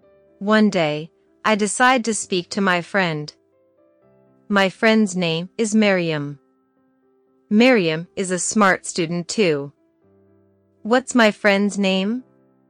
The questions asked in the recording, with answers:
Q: What's my friend's name?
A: Miriam. My friend's name is Miriam.